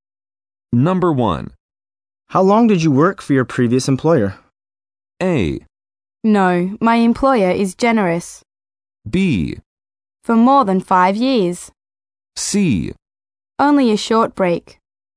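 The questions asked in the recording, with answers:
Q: How long did you work for your previous employer?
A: B: For more than 5 years.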